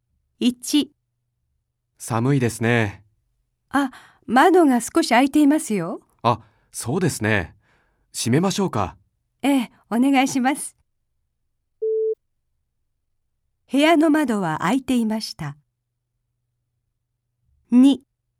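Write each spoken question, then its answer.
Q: 部屋の窓は開いていました。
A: 正しい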